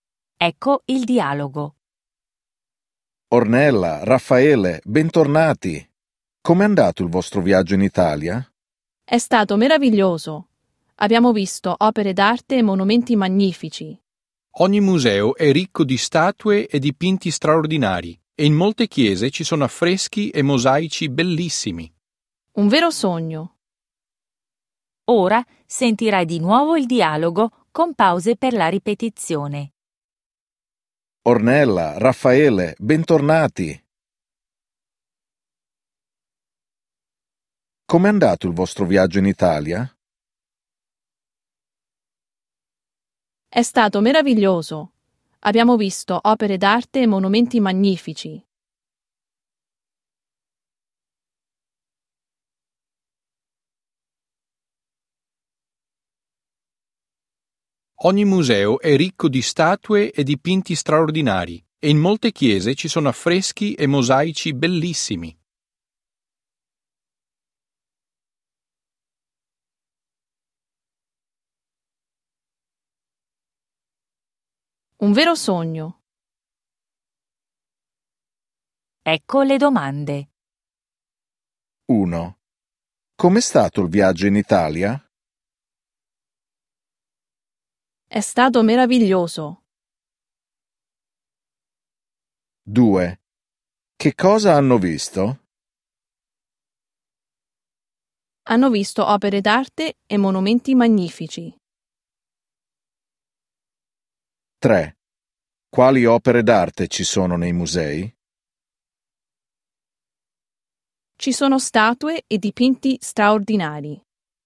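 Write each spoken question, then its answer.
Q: Com'è stato il viaggio in Italia?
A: È stato meraviglioso.

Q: Che cosa hanno visto?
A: Opere d'arte e monumenti magnifici.

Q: Quali opere d'arte ci sono nei musei?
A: Statue e dipinti straordinari.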